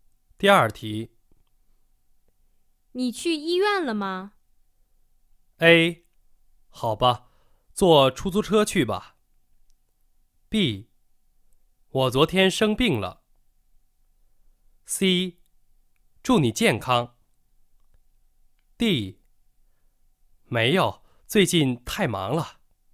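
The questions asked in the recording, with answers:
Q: 你去医院了吗?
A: D: 没有,最近太忙了。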